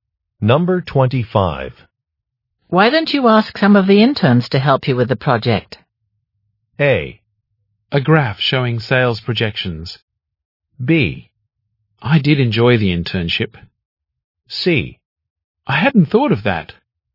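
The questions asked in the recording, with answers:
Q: Why don't you ask some of the interns to help you with the project?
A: C: I hadn't thought of that.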